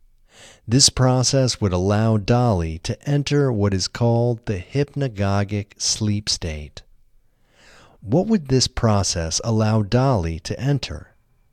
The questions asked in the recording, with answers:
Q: What would this process allow Dali to enter?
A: This process would allow Dali to enter the hypnagogic sleep state.